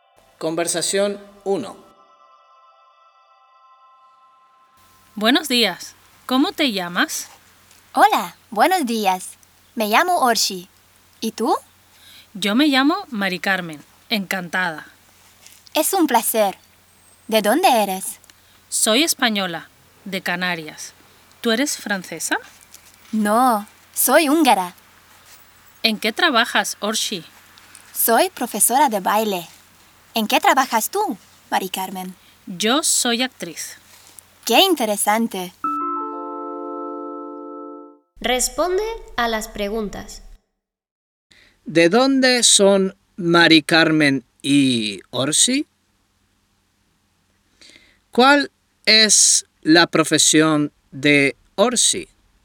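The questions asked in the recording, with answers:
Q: ¿De dónde son Mari Carmen y Orsi?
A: Mari Carmen es de España (Canarias) y Orsi es de Hungría

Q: ¿Cuál es la profesión de Orsi?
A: Profesora de baile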